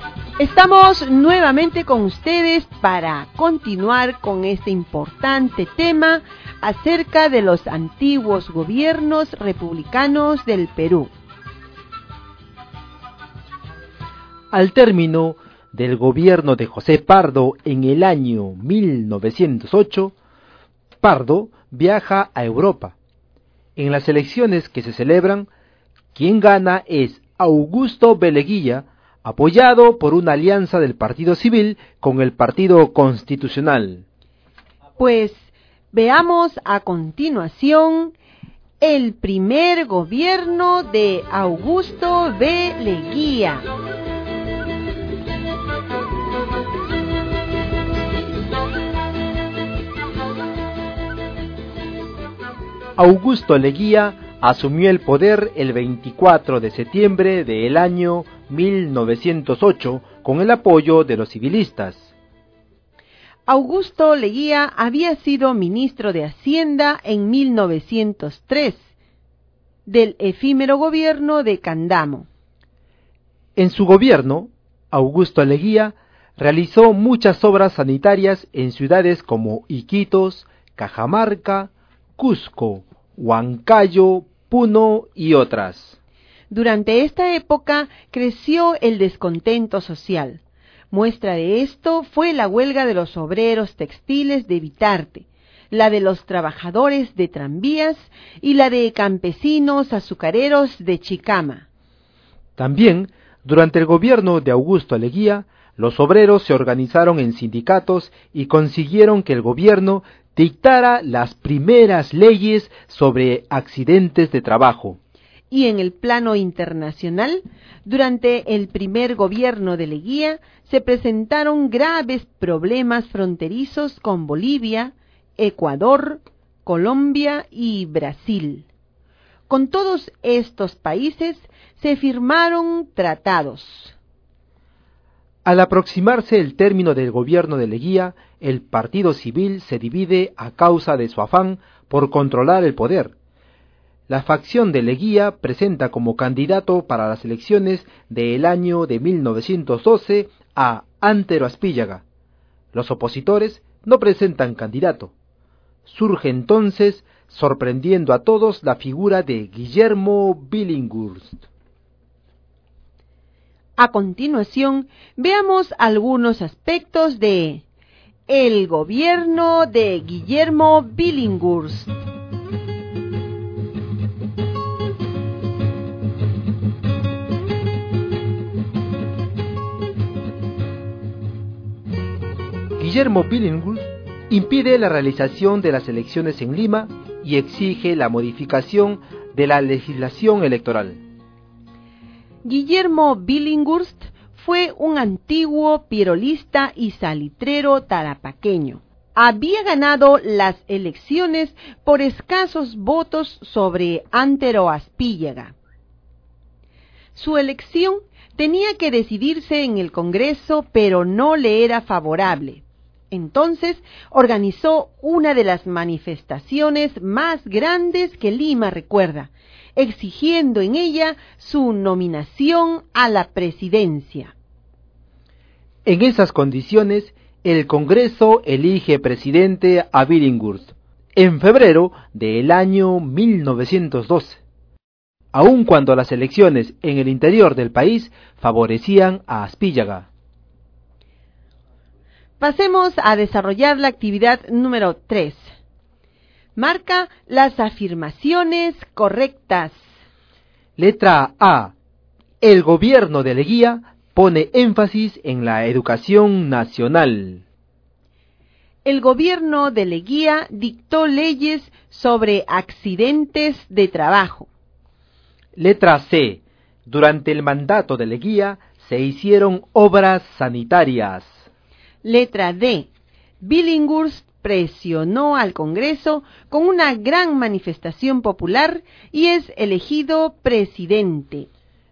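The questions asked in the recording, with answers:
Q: Letra A. El gobierno de Leguía pone énfasis en la educación nacional.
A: Incorrecta

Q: El gobierno de Leguía dictó leyes sobre accidentes de trabajo.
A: Correcta

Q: Letra C. Durante el mandato de Leguía se hicieron obras sanitarias.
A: Correcta

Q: Letra D. Billinghurst presionó al Congreso con una gran manifestación popular y es elegido presidente.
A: Correcta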